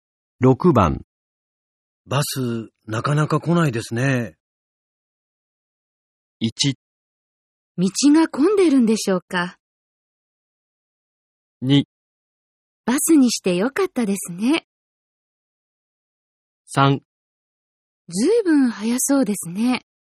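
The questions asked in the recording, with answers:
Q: バス、なかなか来ないですね。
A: 1: 道が混んでるんでしょうか。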